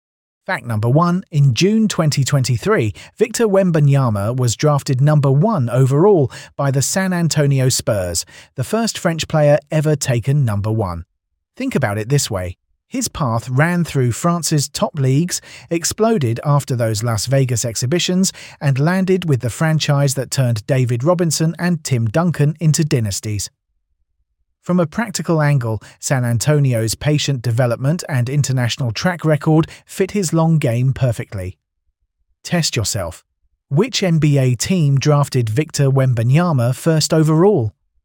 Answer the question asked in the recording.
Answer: Correct answer, San Antonio Spurs.